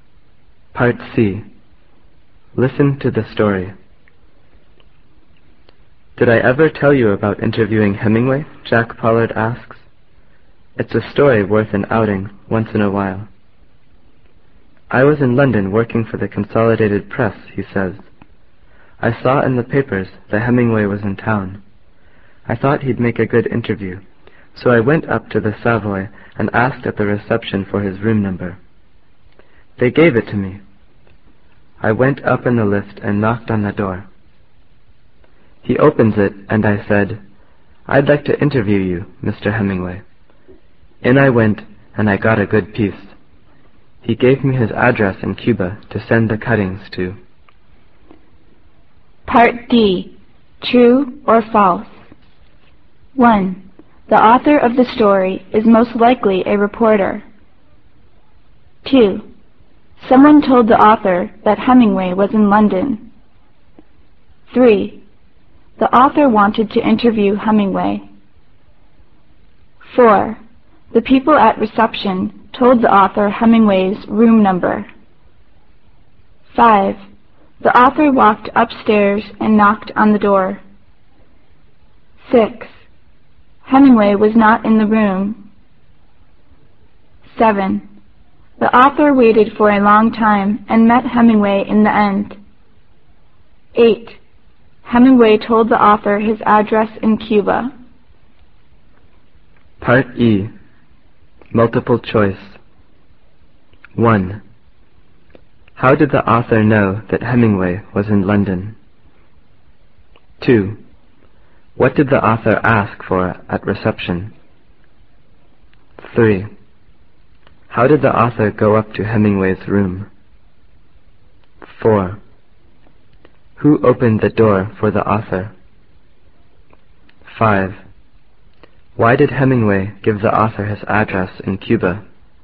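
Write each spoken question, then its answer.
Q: The author of the story is most likely a reporter.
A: True

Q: Someone told the author that Hemingway was in London.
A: False

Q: The author wanted to interview Hemingway.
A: True

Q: The people at reception told the author Hemingway's room number.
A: True

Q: The author walked upstairs and knocked on the door.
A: False

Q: Hemingway was not in the room.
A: False

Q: The author waited for a long time and met Hemingway in the end.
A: False

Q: Hemingway told the author his address in Cuba.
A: True

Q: How did the author know that Hemingway was in London?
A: He saw it in the papers.

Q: What did the author ask for at reception?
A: Hemingway's room number

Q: How did the author go up to Hemingway's room?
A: In the lift

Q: Who opened the door for the author?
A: Hemingway

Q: Why did Hemingway give the author his address in Cuba?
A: So the author could send him the cuttings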